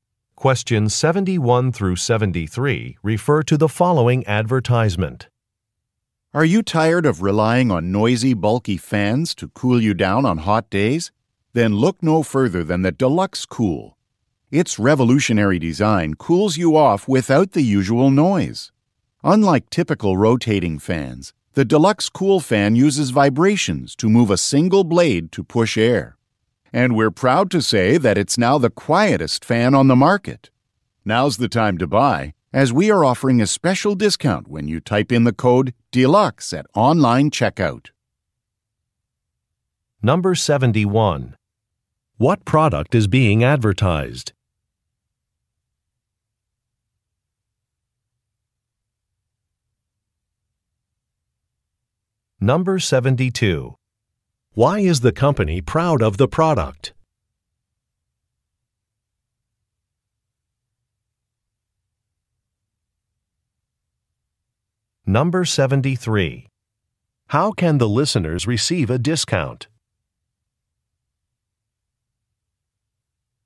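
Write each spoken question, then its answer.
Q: What product is being advertised?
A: A fan (the Deluxe Cool)

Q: Why is the company proud of the product?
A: It is the quietest fan on the market

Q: How can the listeners receive a discount?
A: By typing the code DELUXE at online checkout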